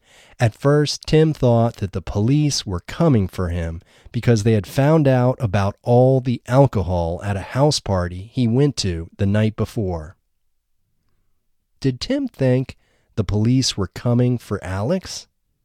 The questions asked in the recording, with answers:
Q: Did Tim think the police were coming for Alex?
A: No, Tim didn't think the police were coming for Alex.